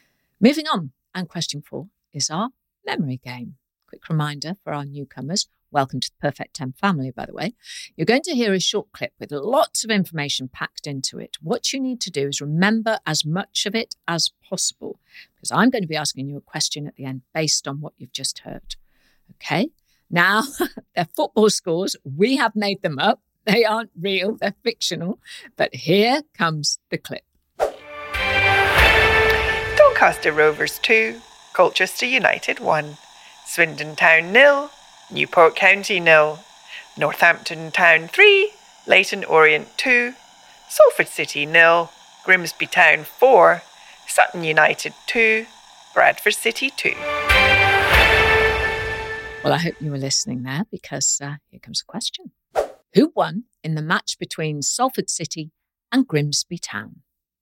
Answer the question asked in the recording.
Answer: And the answer was Grimsby Town, who won 4-0 against Salford City.